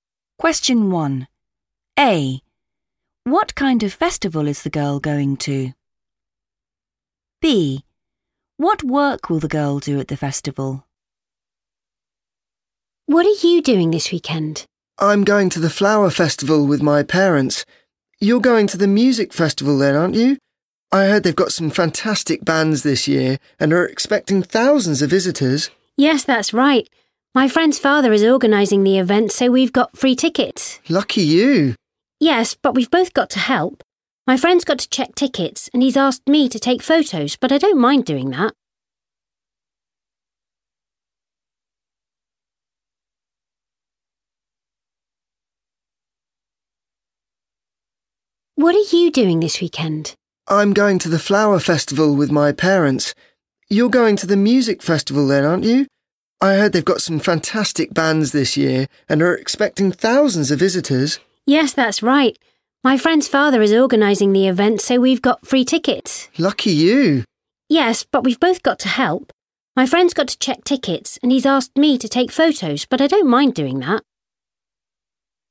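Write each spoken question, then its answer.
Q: What kind of festival is the girl going to?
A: music festival

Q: What work will the girl do at the festival?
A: take photos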